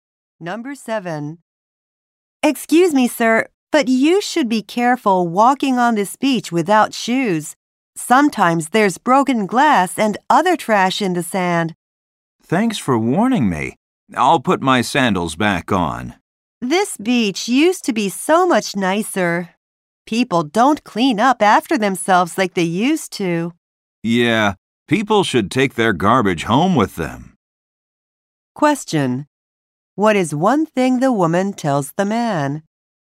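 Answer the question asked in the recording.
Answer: He should wear shoes because there may be broken glass in the sand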